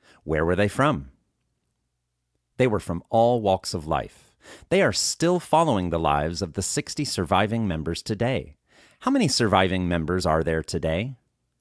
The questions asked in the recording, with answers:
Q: How many surviving members are there today?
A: There are 60 surviving members today.